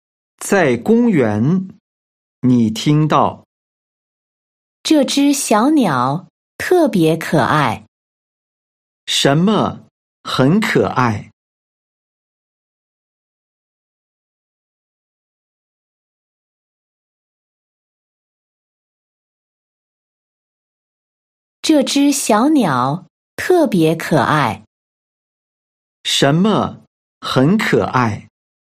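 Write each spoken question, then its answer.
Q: 什么很可爱?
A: 小鸟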